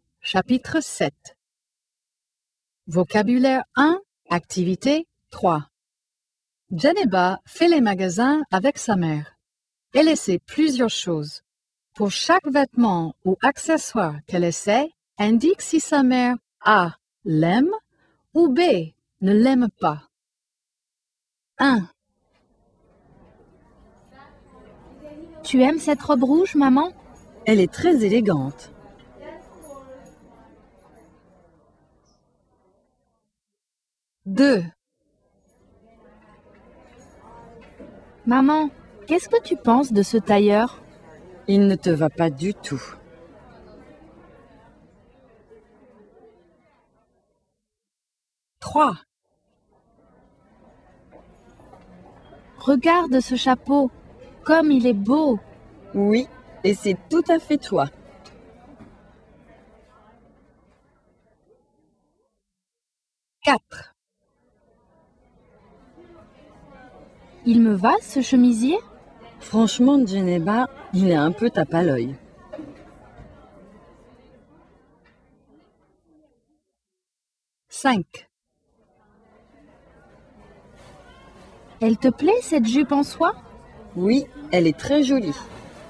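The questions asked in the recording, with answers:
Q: Tu aimes cette robe rouge, maman?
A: A: l'aime

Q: Maman, qu'est-ce que tu penses de ce tailleur?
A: B: ne l'aime pas

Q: Regarde ce chapeau, comme il est beau!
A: A: l'aime

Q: Il me va, ce chemisier?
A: B: ne l'aime pas

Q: Elle te plaît, cette jupe en soie?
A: A: l'aime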